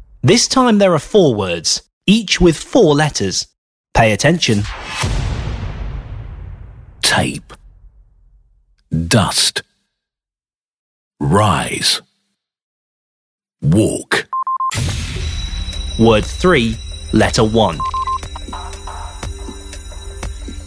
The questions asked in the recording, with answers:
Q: Word 3, letter 1.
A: R is the answer.